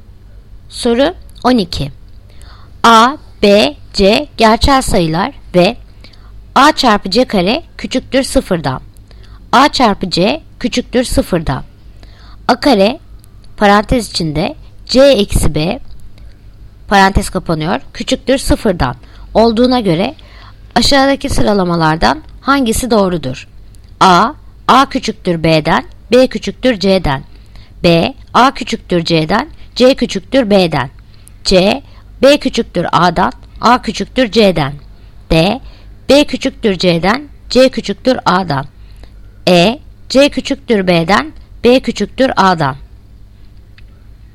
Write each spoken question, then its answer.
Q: A kare parantez içinde C eksi B parantez kapanıyor küçüktür sıfırdan olduğuna göre aşağıdaki sıralamalardan hangisi doğrudur?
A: Yanıt Bursa. A küçüktür C'den, C küçüktür B'den.